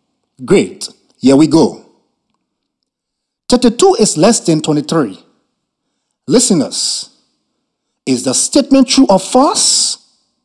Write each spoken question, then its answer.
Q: Listeners, is the statement true or false?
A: It is false.